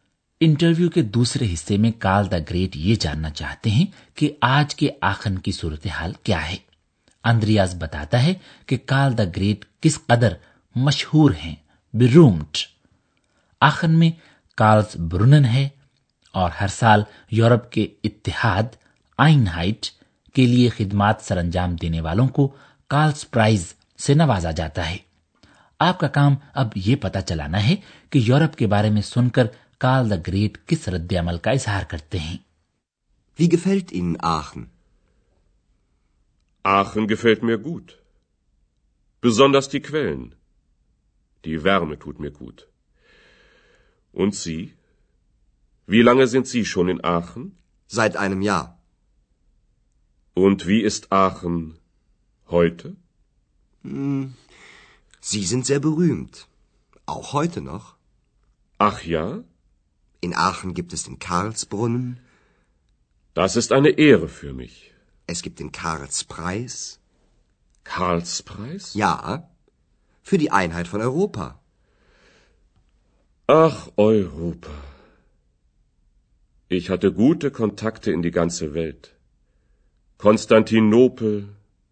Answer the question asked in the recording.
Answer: جب کال دا great لفظ Europe سنتے ہیں تو وہ آہ بھر کر صرف یہ کہتے ہیں کہ آہ Europe اور پھر وہ پوری دنیا کے ساتھ اپنے روابط کے بارے میں سوچنے لگتے ہیں